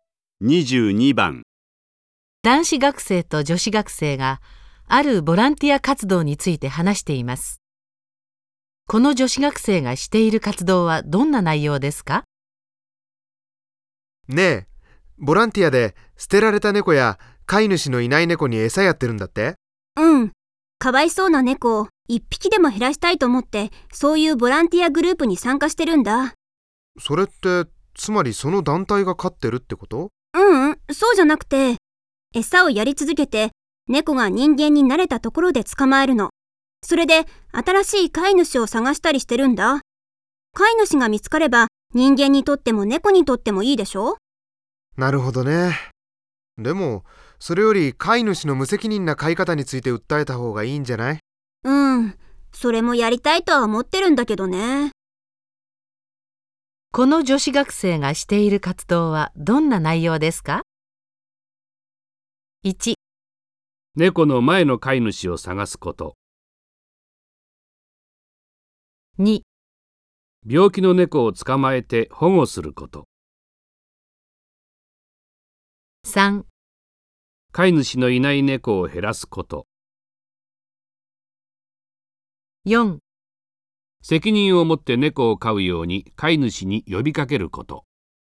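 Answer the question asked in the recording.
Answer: 3: 飼い主のいない猫を減らすこと。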